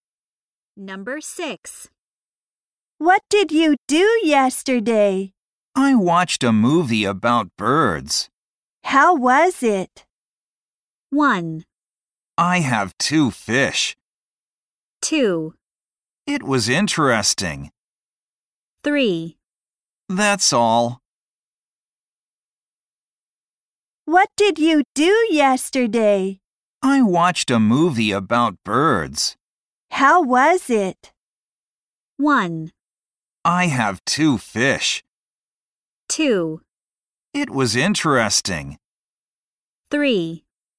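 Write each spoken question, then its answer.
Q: How was it?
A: 2: It was interesting.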